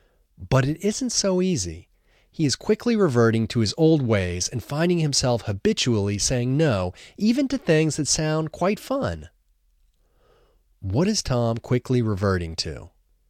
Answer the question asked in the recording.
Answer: Tom is quickly reverting to his old ways.